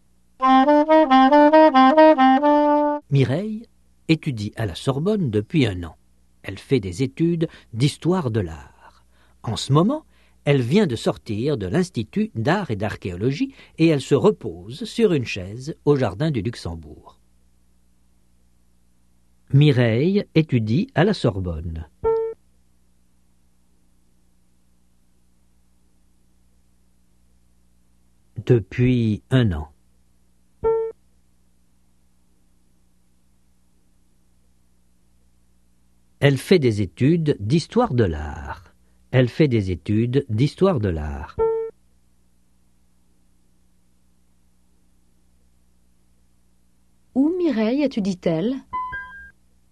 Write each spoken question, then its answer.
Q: Où Mireille étudie-t-elle?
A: À la Sorbonne.